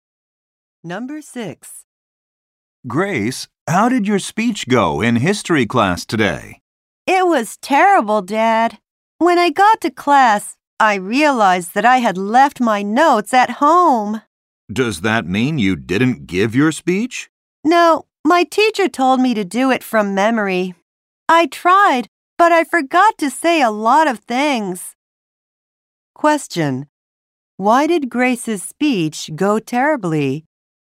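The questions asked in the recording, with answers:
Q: Why did Grace's speech go terribly?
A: She left her notes at home and forgot a lot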